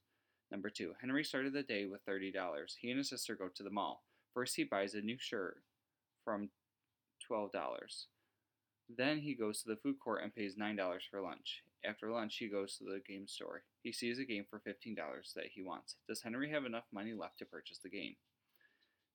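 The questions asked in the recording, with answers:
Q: Does Henry have enough money left to purchase the game?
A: No, he has only $9 left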